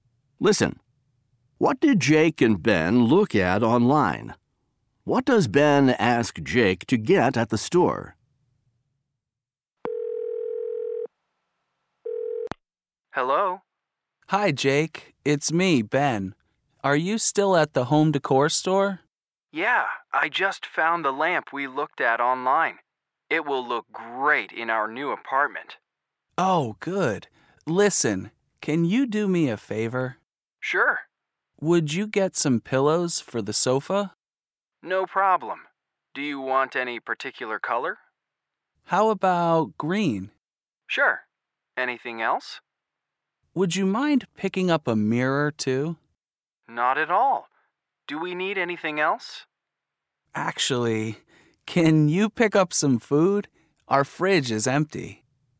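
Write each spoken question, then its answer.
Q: What did Jake and Ben look at online?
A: A lamp

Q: What does Ben ask Jake to get at the store?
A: Pillows for the sofa and a mirror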